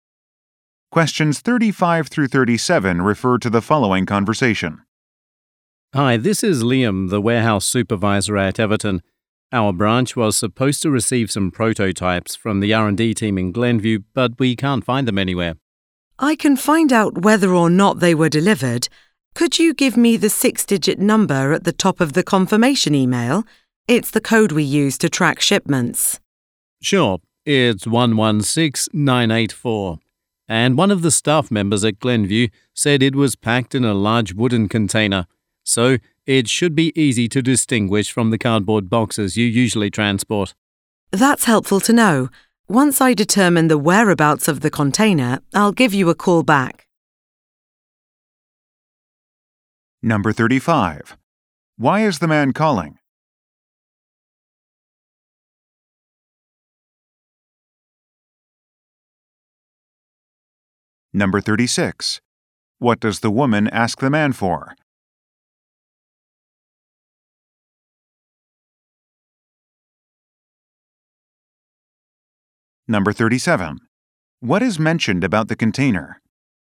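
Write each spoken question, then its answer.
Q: Why is the man calling?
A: Some prototypes cannot be found

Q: What does the woman ask the man for?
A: A tracking number

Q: What is mentioned about the container?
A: It is wooden and easy to distinguish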